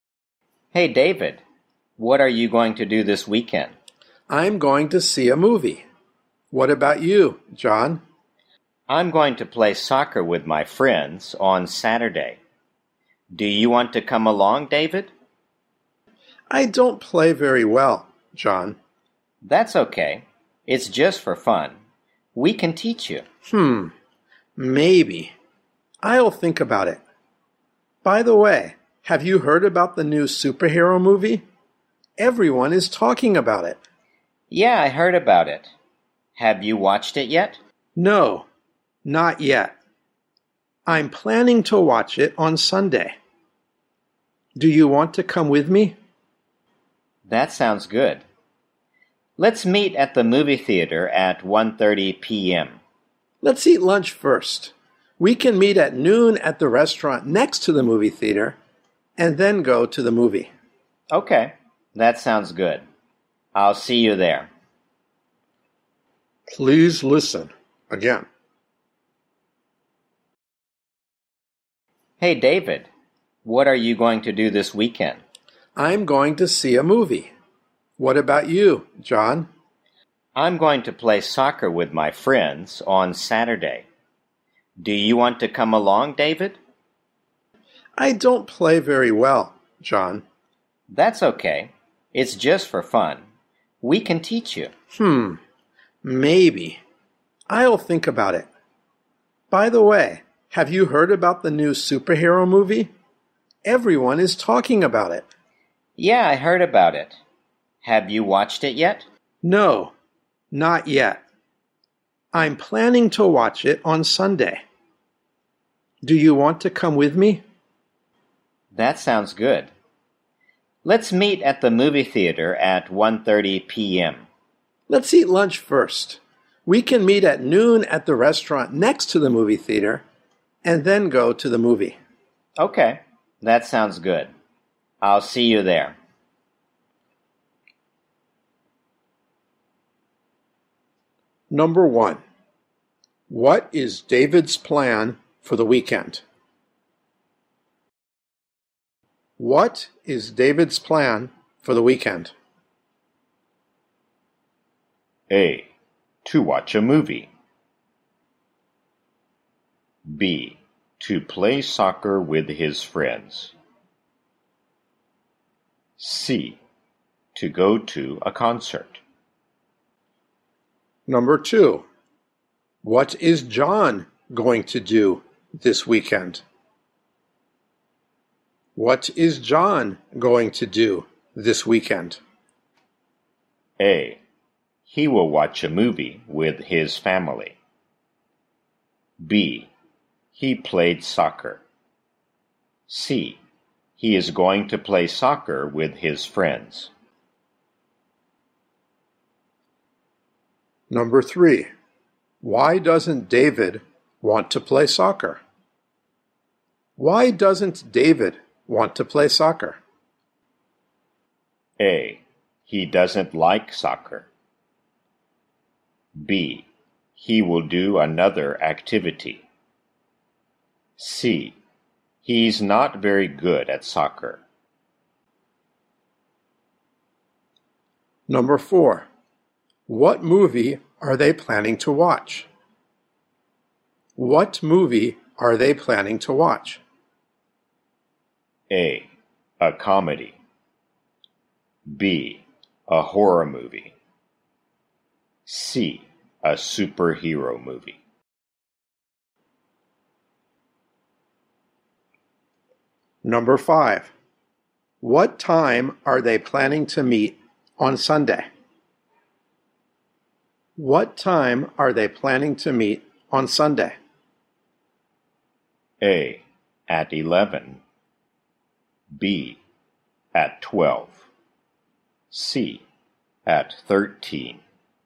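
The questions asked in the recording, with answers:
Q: what is David's plan for the weekend?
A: A: To watch a movie.

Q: What is John going to do this weekend?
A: C: He is going to play soccer with his friends.

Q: Why doesn't David want to play soccer?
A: C: He's not very good at soccer.

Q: What movie are they planning to watch?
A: C: A superhero movie.

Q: What time are they planning to meet on Sunday?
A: B: At 12.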